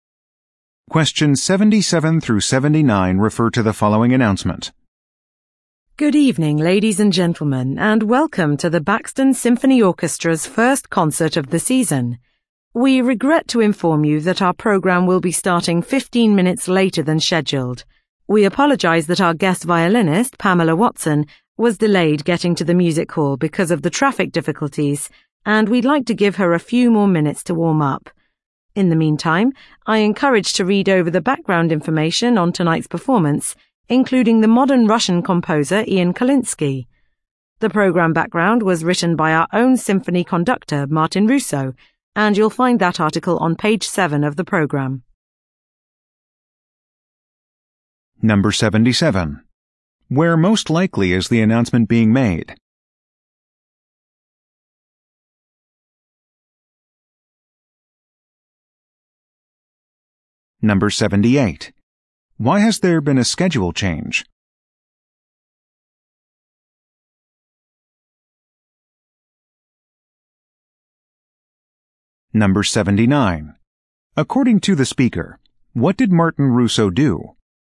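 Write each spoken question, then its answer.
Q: Where most likely is the announcement being made?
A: At a concert hall (symphony concert)

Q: Why has there been a schedule change?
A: The guest violinist was delayed by traffic

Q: According to the speaker, what did Martin Russo do?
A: He wrote the program background article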